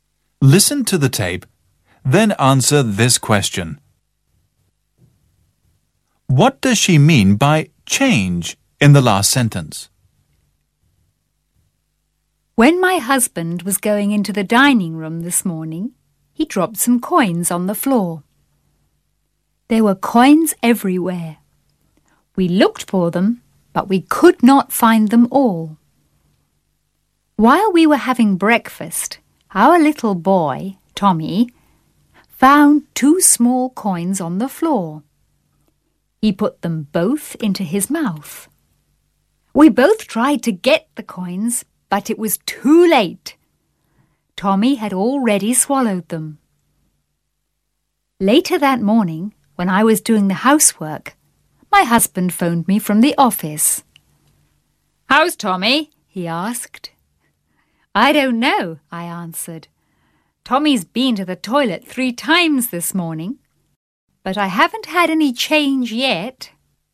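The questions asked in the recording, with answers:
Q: What does she mean by change in the last sentence?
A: The coins (money) Tommy swallowed; they haven't come out yet (a pun on change meaning coins)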